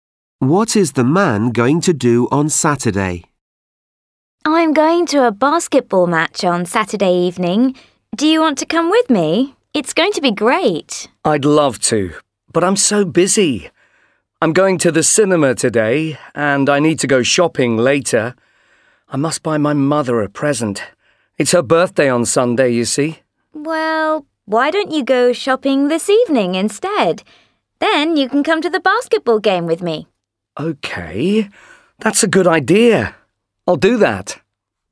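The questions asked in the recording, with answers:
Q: What is the man going to do on Saturday?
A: Go to a basketball match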